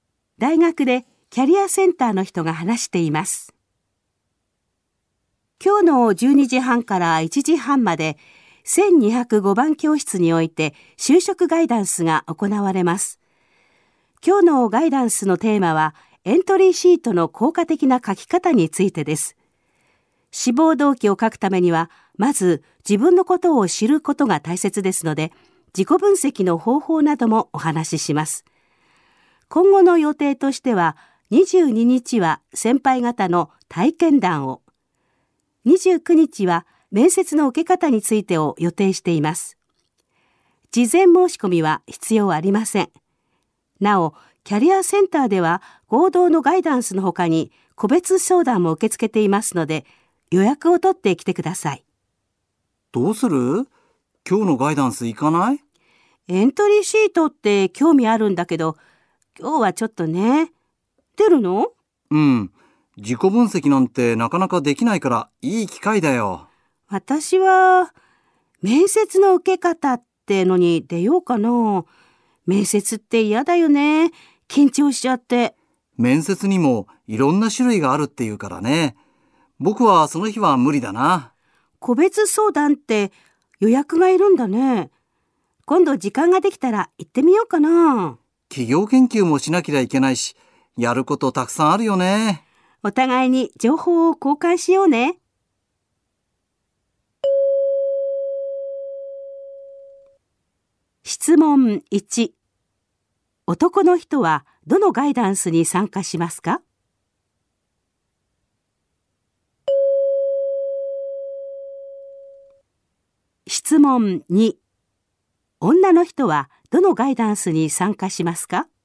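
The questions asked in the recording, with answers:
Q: 男の人はどのガイダンスに参加しますか?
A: 今日のエントリーシートの書き方のガイダンス

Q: 女の人はどのガイダンスに参加しますか?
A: 29日の面接の受け方のガイダンス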